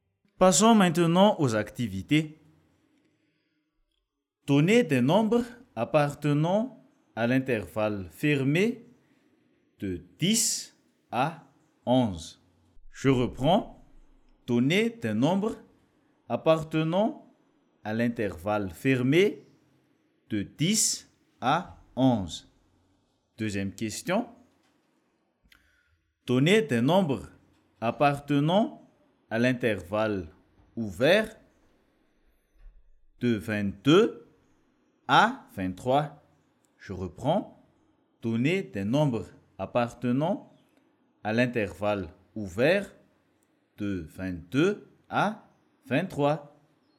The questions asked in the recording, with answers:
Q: Donnez des nombres appartenant à l'intervalle fermé de 10 à 11.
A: 10, 10,1, 10,205, 10,7, 10,989, jusqu'à 11.